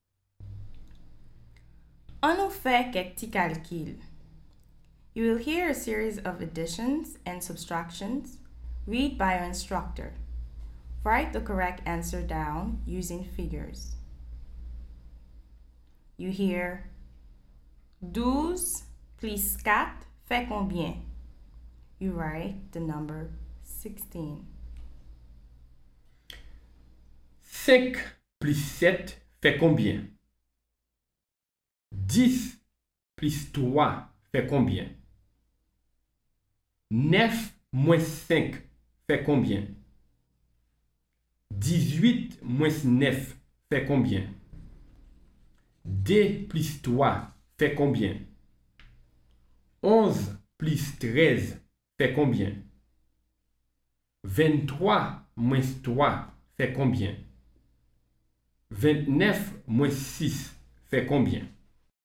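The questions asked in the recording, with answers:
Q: 5 plus 7 fait combien?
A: 12

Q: 10 plus 3 fait combien?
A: 13

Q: 11 plus 13 fait combien?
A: 24

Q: 23 moins 3 fait combien?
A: 20

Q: 29 moins 6 fait combien?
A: 23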